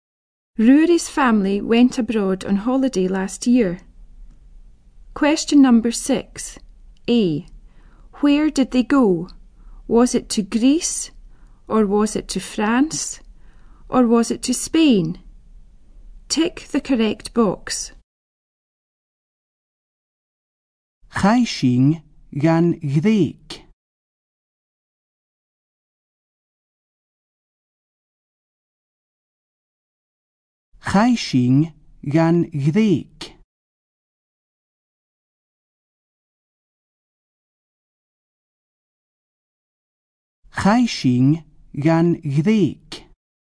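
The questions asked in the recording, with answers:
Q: Where did they go?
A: Greece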